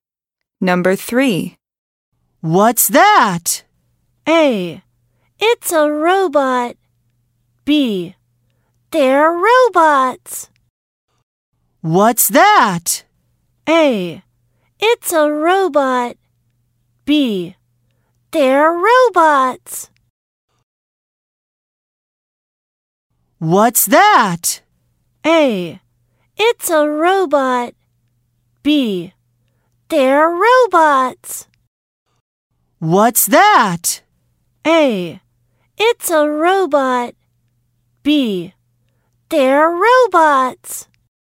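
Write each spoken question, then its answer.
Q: What's that?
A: A: It's a robot.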